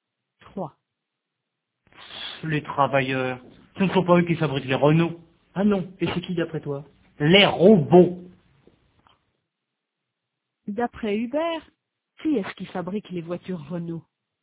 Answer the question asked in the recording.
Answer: Les robots.